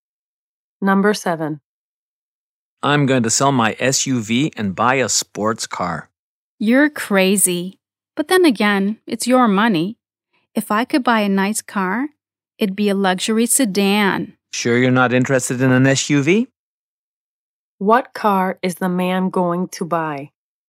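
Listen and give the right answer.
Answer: A sports car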